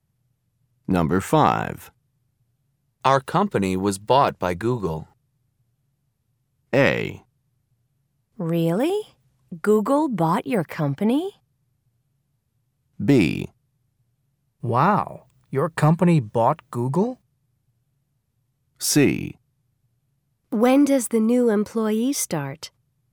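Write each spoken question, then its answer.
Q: Our company was bought by Google.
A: A: Really? Google bought your company?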